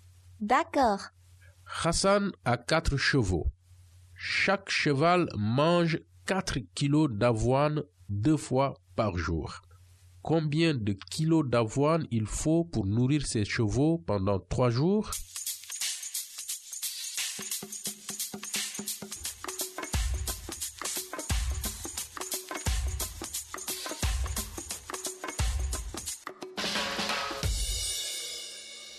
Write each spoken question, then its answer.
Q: Combien de kilos d'avoine il faut pour nourrir ses chevaux pendant 3 jours?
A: Donc Hassan doit avoir 96 kilos d'avoine pour nourrir ses chevaux pendant 3 jours.